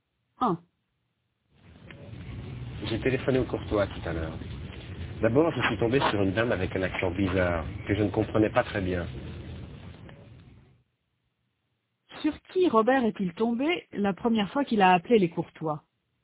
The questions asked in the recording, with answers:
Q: Sur qui Robert est-il tombé la première fois qu'il a appelé les Courtois?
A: Sur une dame avec un accent bizarre.